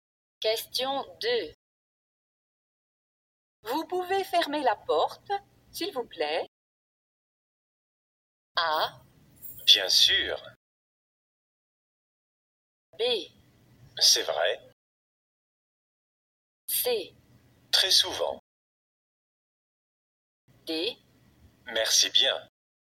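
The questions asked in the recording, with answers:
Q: Vous pouvez fermer la porte, s'il vous plaît?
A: A: Bien sûr.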